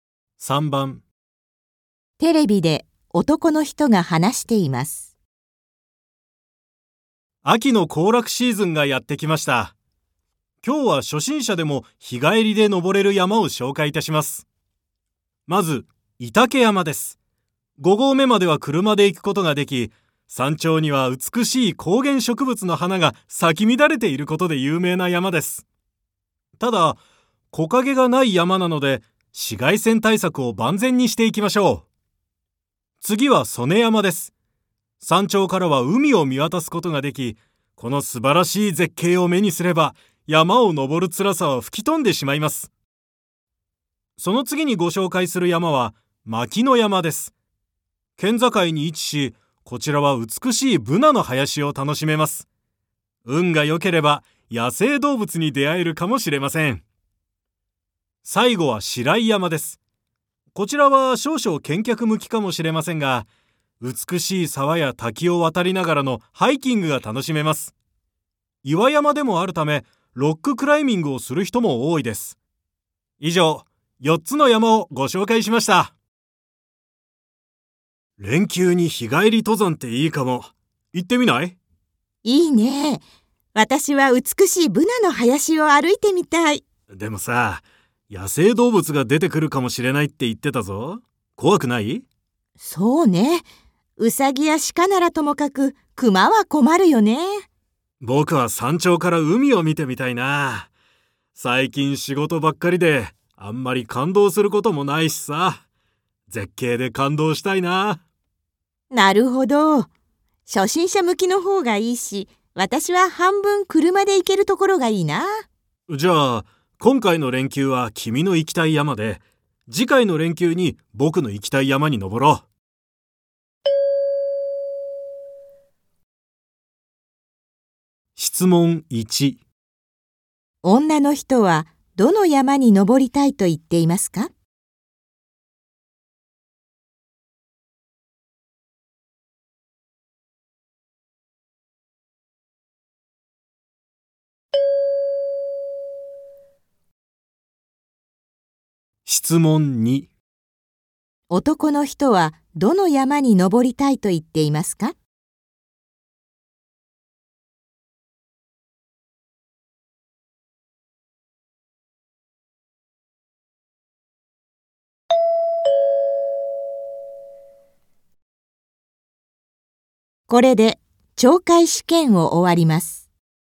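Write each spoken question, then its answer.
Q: 女の人はどの山に登りたいと言っていますか?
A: 御嶽山

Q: 男の人はどの山に登りたいと言っていますか?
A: 曽根山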